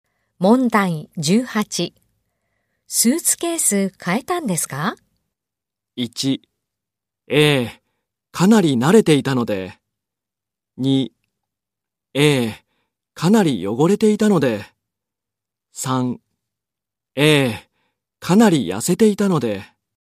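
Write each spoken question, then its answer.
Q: スーツケース変えたんですか?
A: 3: ええ、かなり汚れていたので。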